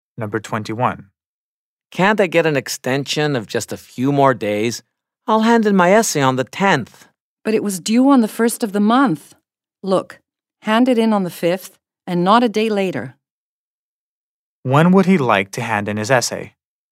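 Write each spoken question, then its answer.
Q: When would he like to hand in his essay?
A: On the 10th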